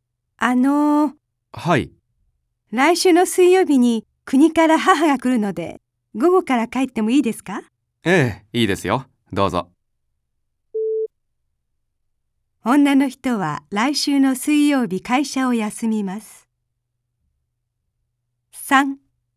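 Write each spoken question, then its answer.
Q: 女の人は来週の水曜日会社を休みます。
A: ×(午後から帰るだけ)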